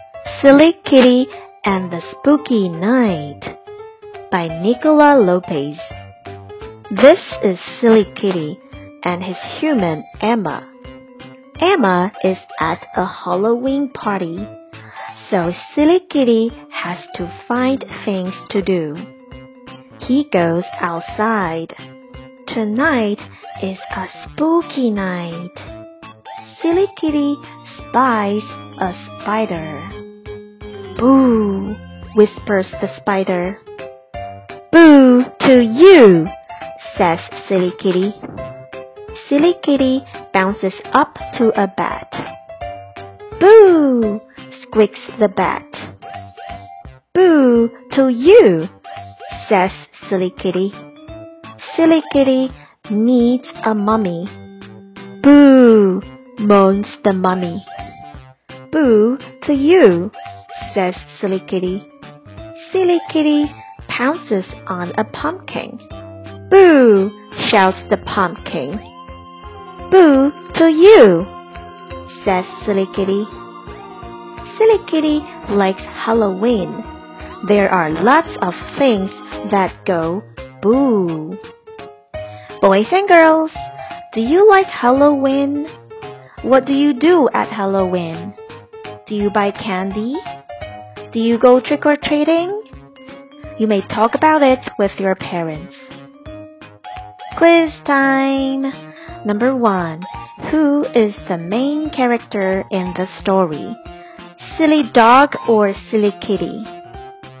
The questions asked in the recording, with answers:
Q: Who is the main character in the story?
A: The answer is silly kitty.